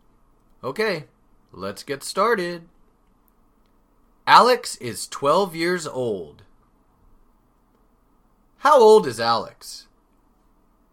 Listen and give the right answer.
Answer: 12 years old. Alex is 12 years old.